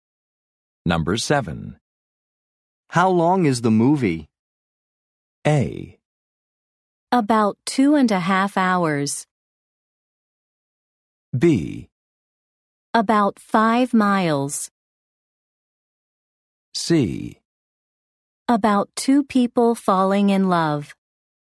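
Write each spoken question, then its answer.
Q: How long is the movie?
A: A: About 2.5 hours.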